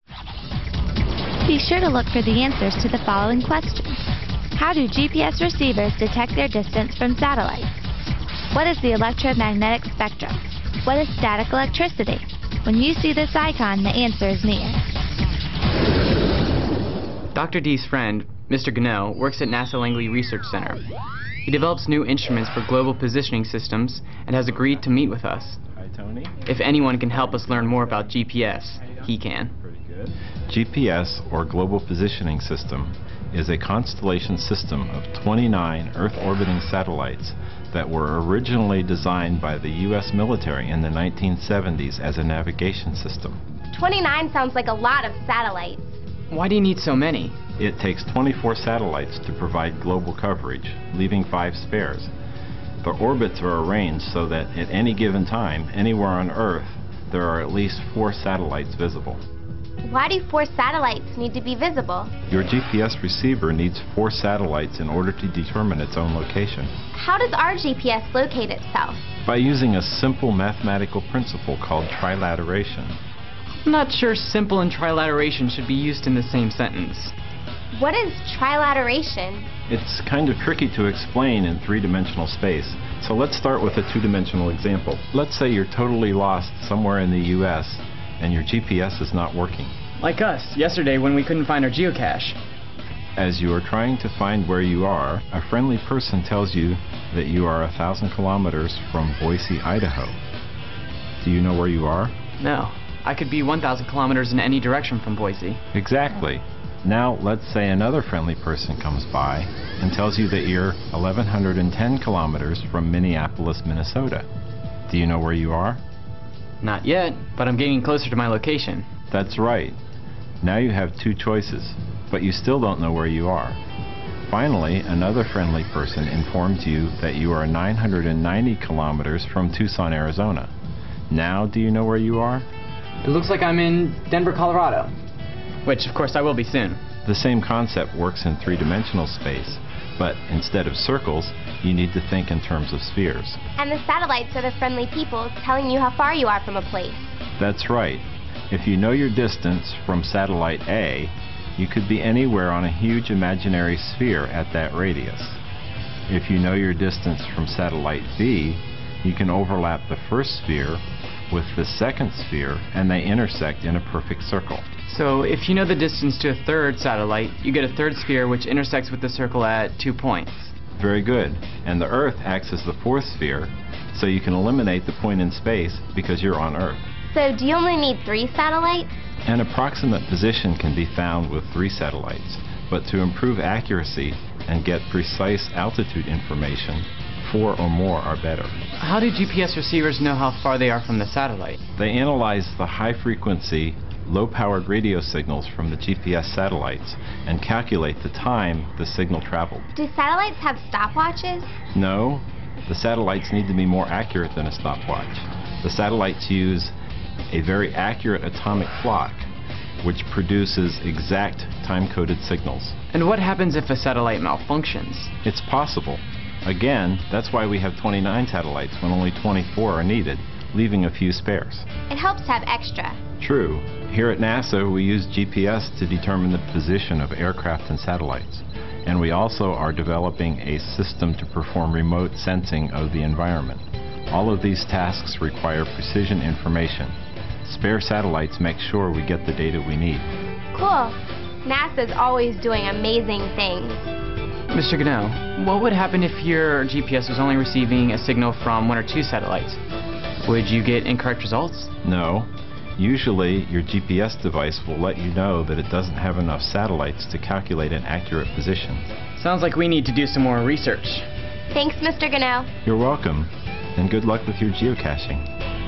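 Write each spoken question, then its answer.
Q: How do GPS receivers detect their distance from satellites?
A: They analyze the radio signals from the satellites and calculate how long each signal took to travel.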